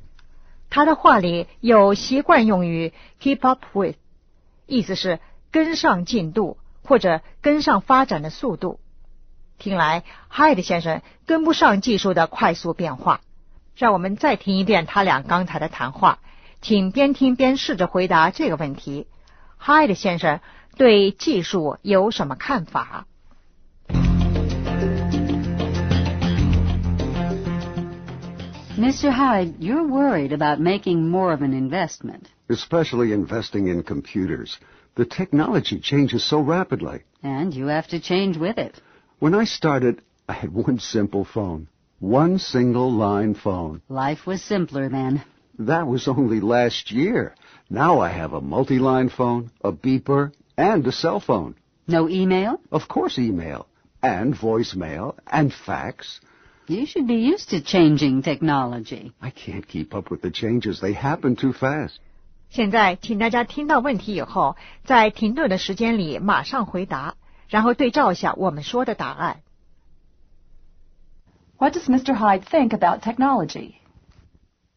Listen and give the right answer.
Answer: It changes rapidly. It changes too fast.